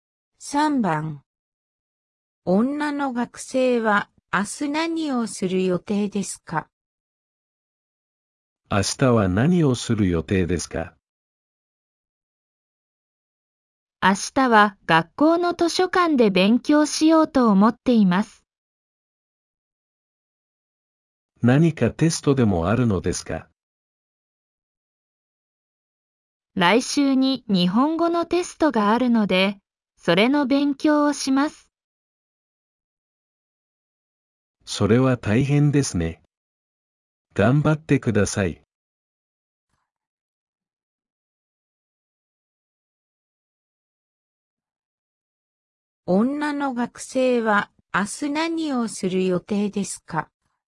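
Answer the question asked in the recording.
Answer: 学校の図書館で日本語のテストの勉強をする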